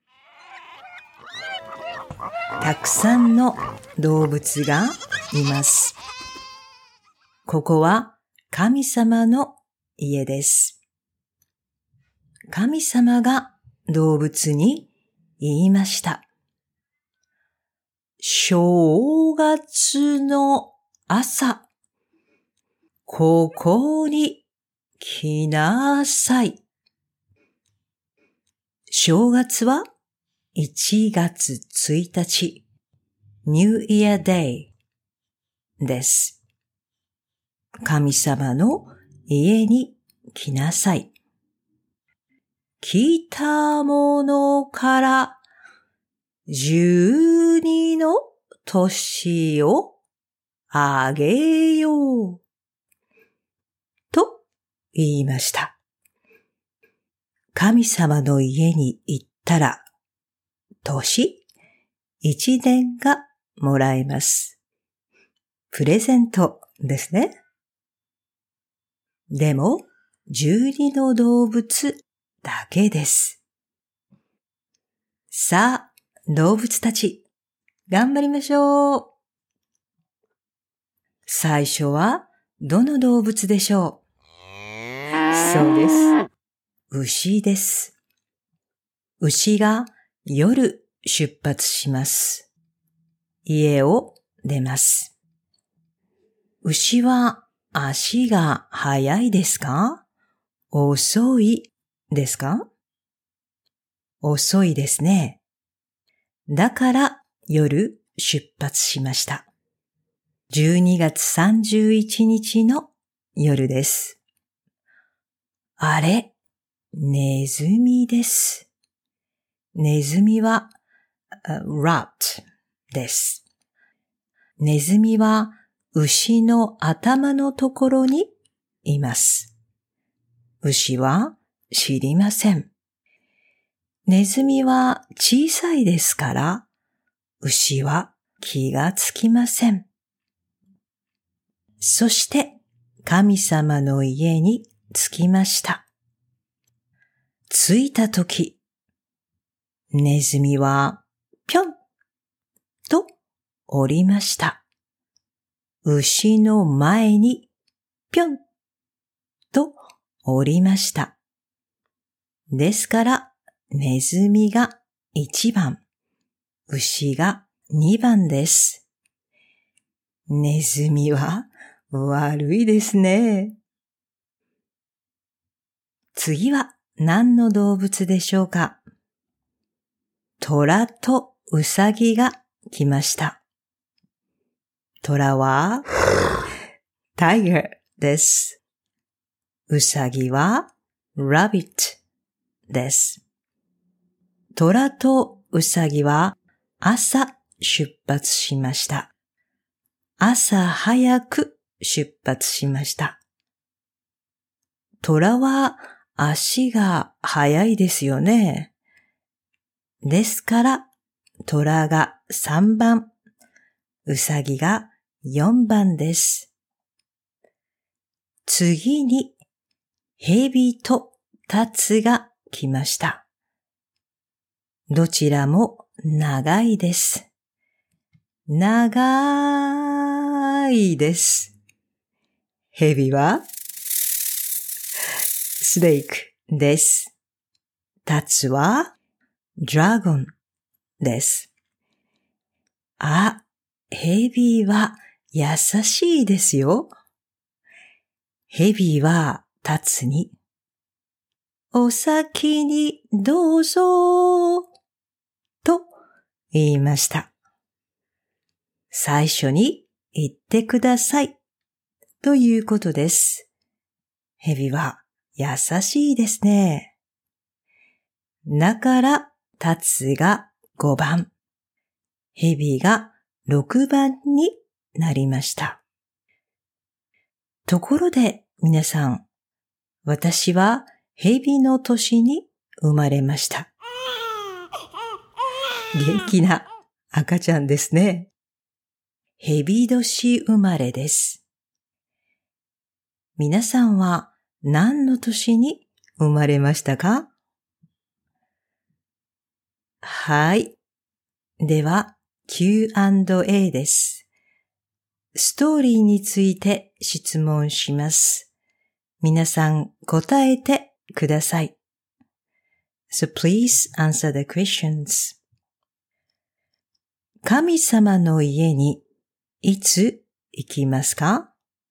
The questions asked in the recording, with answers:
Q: 神様の家にいつ行きますか?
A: 正月です。1月1日です。